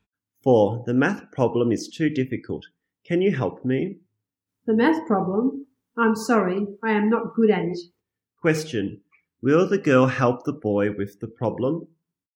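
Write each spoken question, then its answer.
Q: Question, will the girl help the boy with the problem?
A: No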